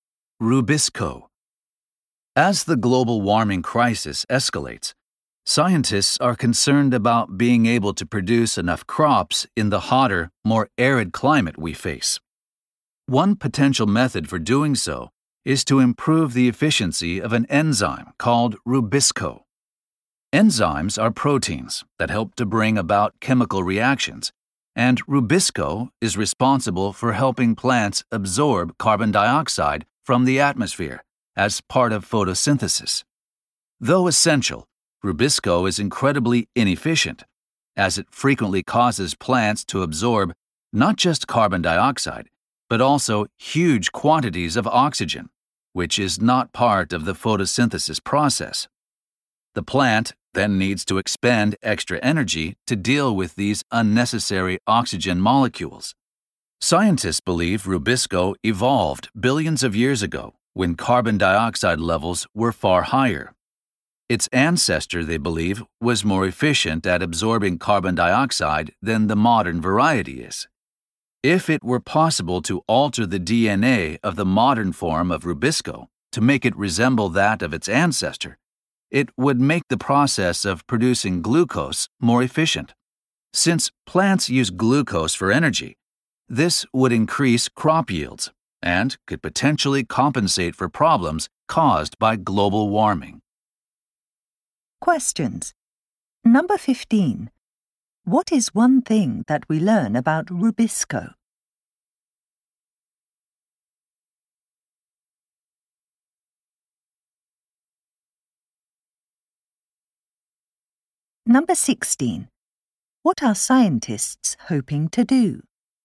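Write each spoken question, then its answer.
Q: What is one thing that we learn about Rubisco?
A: It is inefficient because it makes plants absorb lots of oxygen as well as carbon dioxide.

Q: What are scientists hoping to do?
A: Alter Rubisco's DNA to resemble its more efficient ancestor and so increase crop yields.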